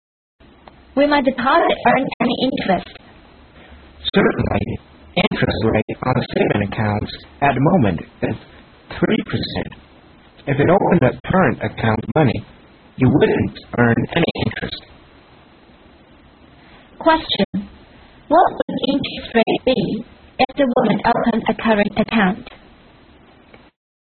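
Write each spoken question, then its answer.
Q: What would the interest rate be if the woman opened a current account?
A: No interest (0%)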